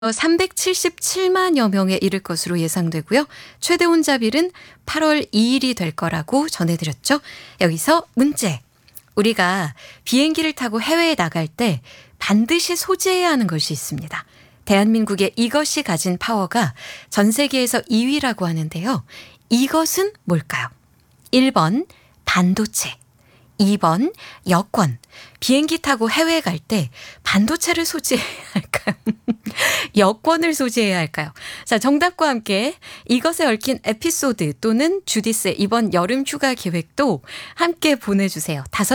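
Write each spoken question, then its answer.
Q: 이것은 뭘까요? 1번 반도체, 2번 여권.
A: 2번: 여권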